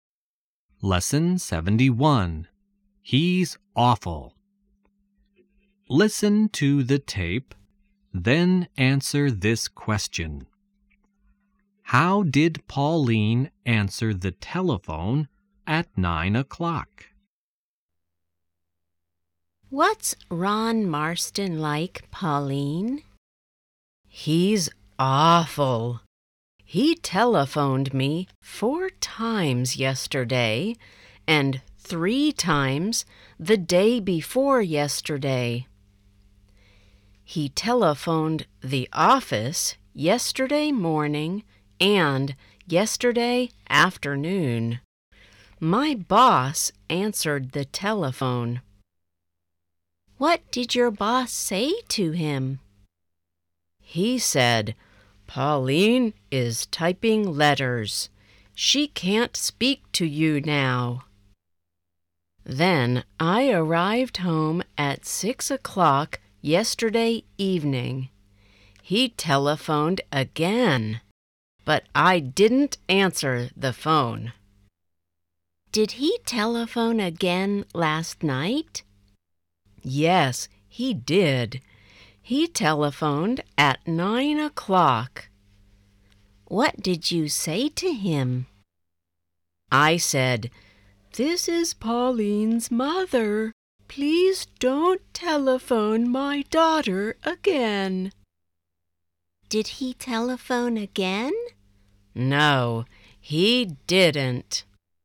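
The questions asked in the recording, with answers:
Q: How did Pauline answer the telephone at 9 o'clock?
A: She said, "This is Pauline's mother. Please don't telephone my daughter again."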